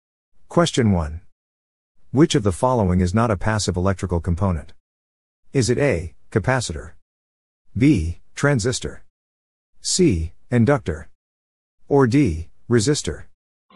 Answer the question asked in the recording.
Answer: The answer is B. Transistor.